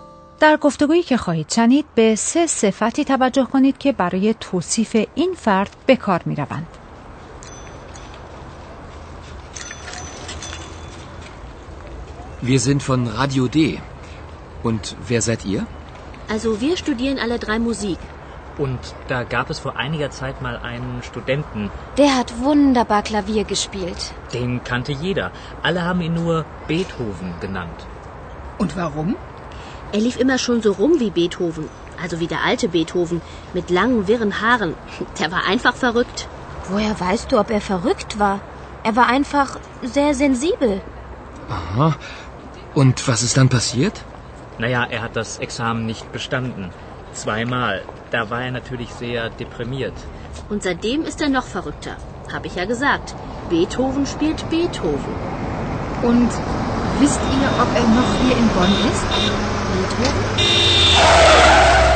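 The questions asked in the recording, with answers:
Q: در گفتگویی که خواهید شنید به سه صفتی توجه کنید که برای توصیف این فرد به کار می روند.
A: verrückt، sensibel، deprimiert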